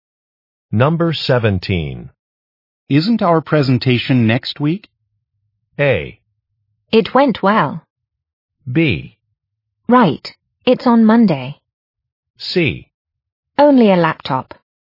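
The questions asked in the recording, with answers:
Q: Isn't our presentation next week?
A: B: Right, it's on Monday.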